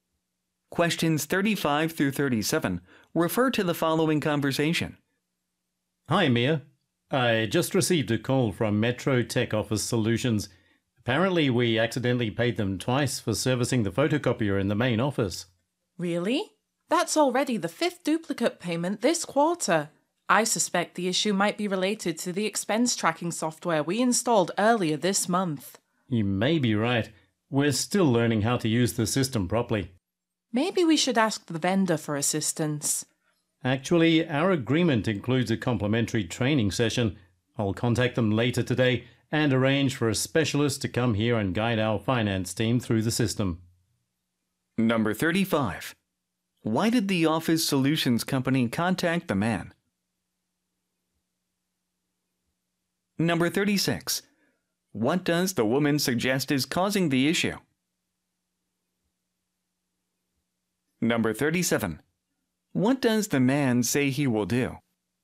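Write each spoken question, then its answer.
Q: Why did the office solutions company contact the man?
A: They were paid twice for servicing the photocopier

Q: What does the woman suggest is causing the issue?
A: The new expense tracking software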